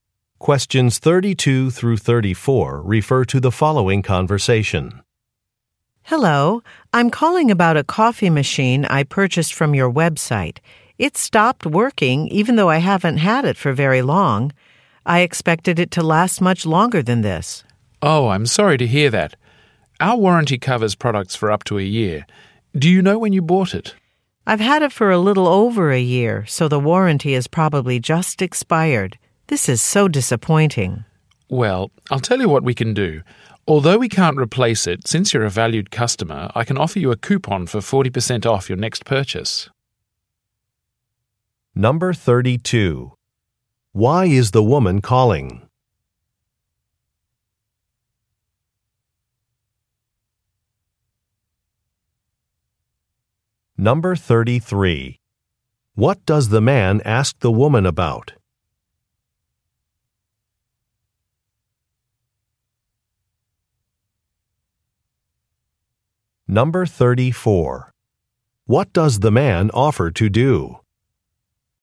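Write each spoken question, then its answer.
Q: Why is the woman calling?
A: Her coffee machine stopped working

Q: What does the man ask the woman about?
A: When she bought the coffee machine

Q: What does the man offer to do?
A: Give her a coupon for 40% off her next purchase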